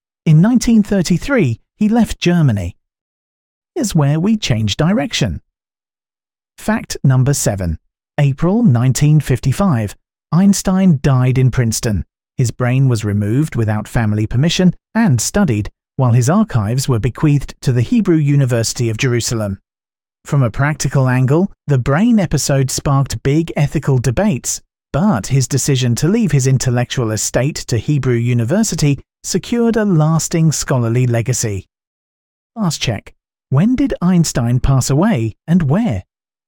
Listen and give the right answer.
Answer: Correct answer, April 1955, Princeton.